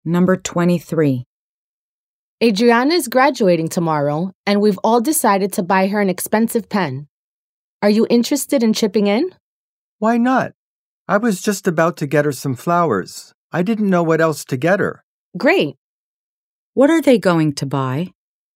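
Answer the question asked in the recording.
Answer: An expensive pen for Adriana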